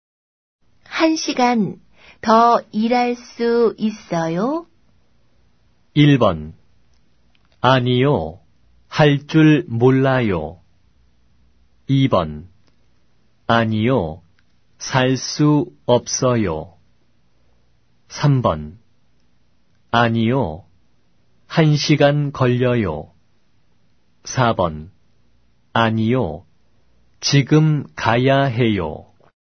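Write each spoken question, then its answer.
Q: 한 시간 더 일할 수 있어요?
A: 4: 아니요, 지금 가야 해요.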